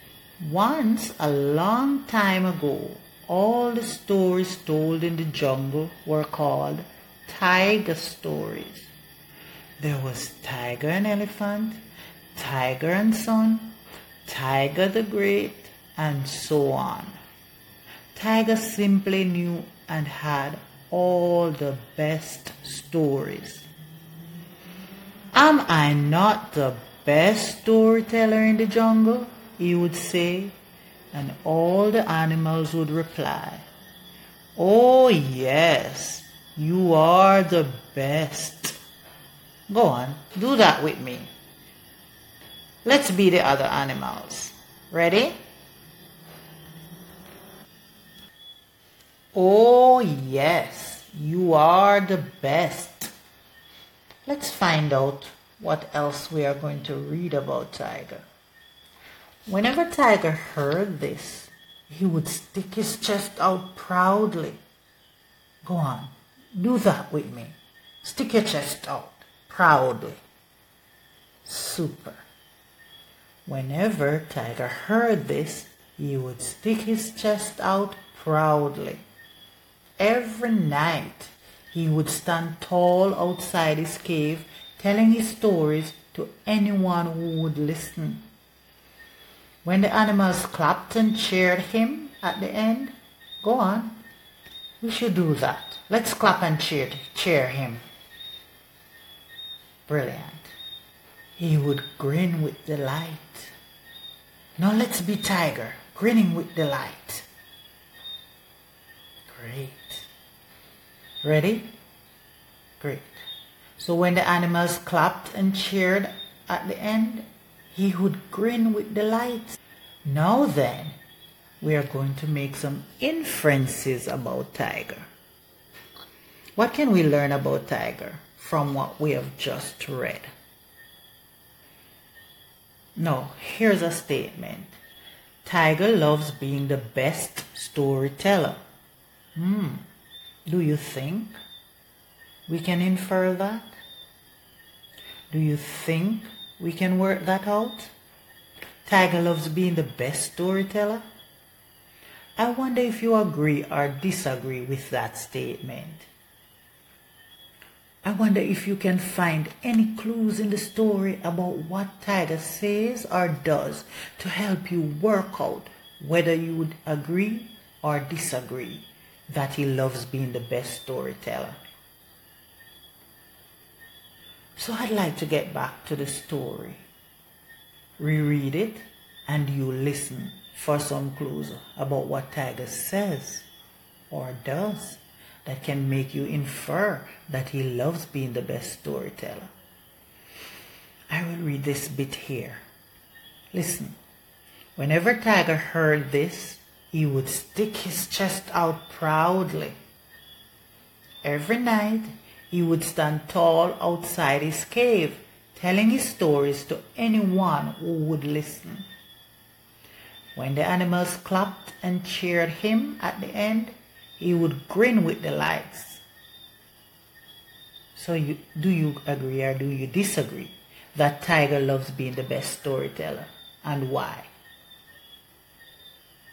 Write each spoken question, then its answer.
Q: So do you agree or do you disagree that Tiger loves being the best storyteller and why?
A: So it sounds like most of you agree with that statement.